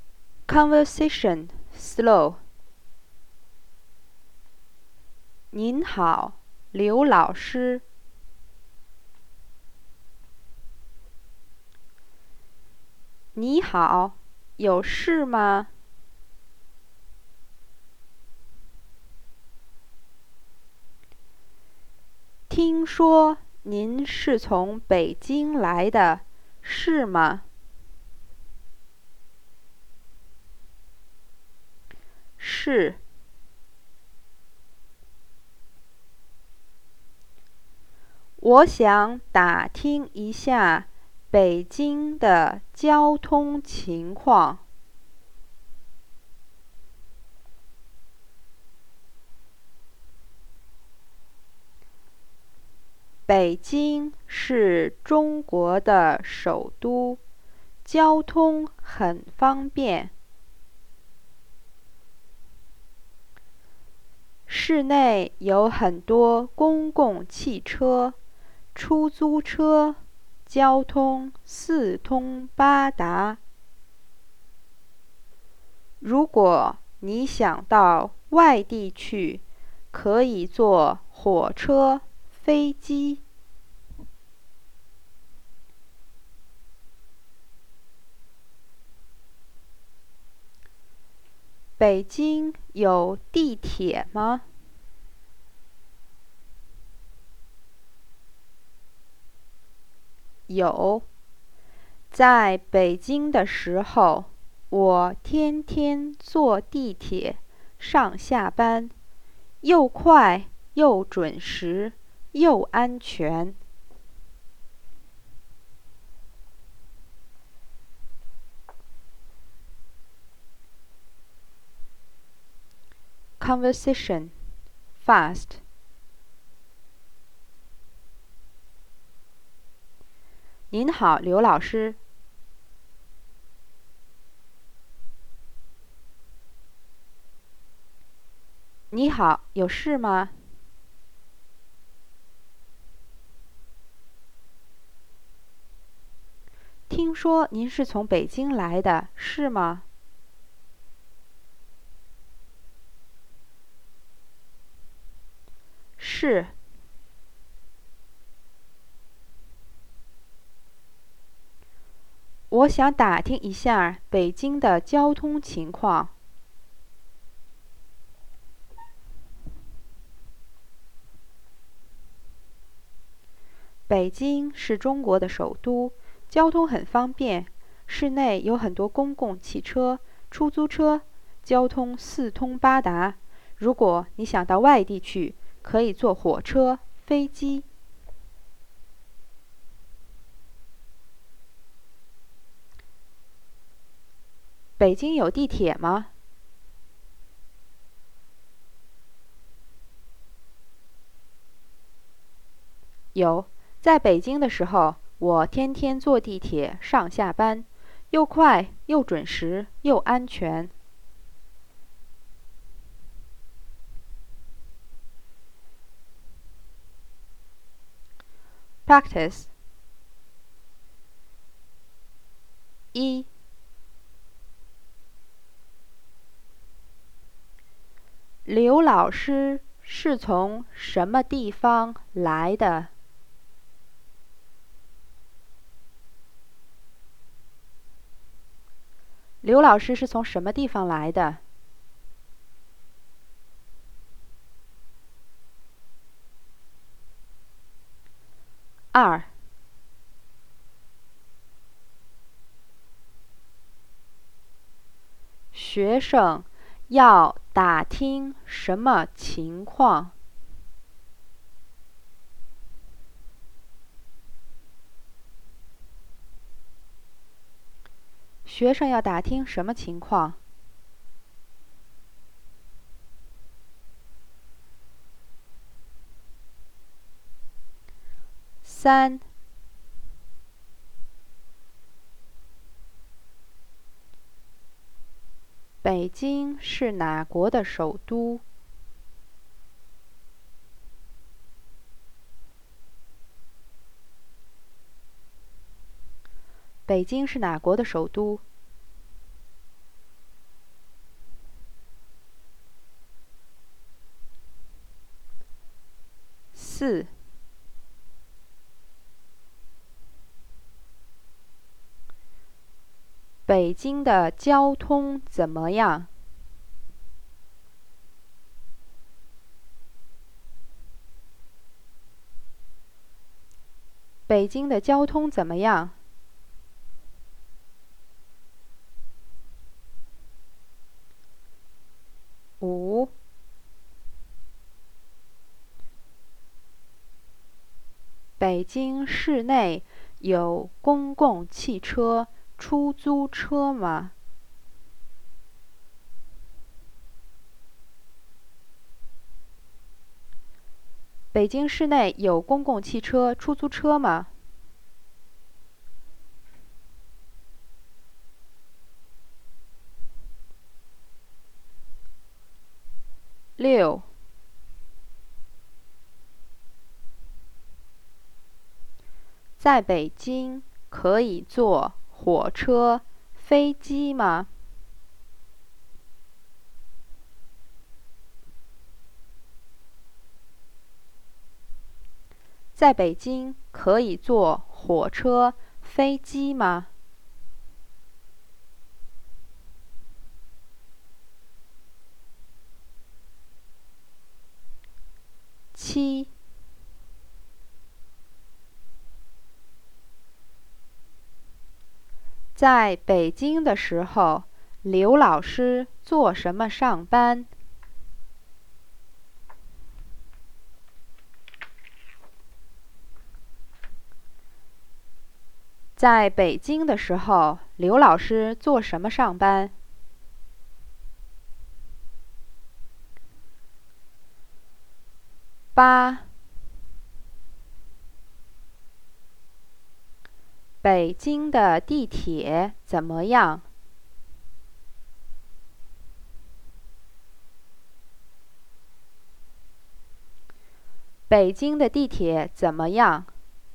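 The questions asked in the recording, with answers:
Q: 刘老师是从什么地方来的?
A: 北京

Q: 学生要打听什么情况?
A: 北京的交通情况

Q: 北京是哪国的首都?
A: 中国

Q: 北京的交通怎么样?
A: 很方便,四通八达

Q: 北京市内有公共汽车、出租车吗?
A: 有,有很多

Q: 在北京可以坐火车、飞机吗?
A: 可以,去外地可以坐火车、飞机

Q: 在北京的时候,刘老师做什么上班?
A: 坐地铁

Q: 北京的地铁怎么样?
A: 又快又准时又安全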